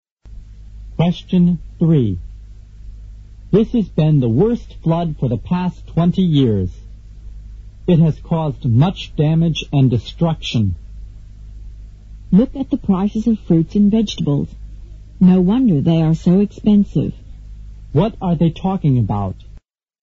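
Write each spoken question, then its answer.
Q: What are they talking about?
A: The flood and the damage it caused, which has made fruit and vegetables expensive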